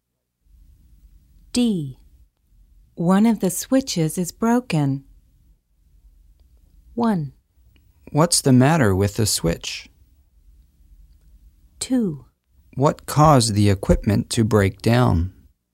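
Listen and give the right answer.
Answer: 2: What caused the equipment to break down?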